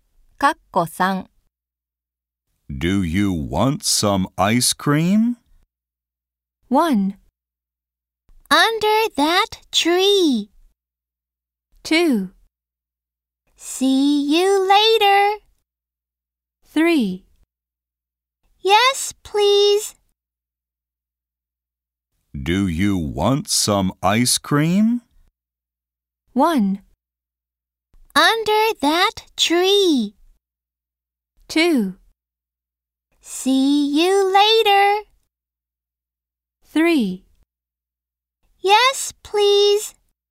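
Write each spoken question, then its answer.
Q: Do you want some ice cream?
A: 3: Yes, please.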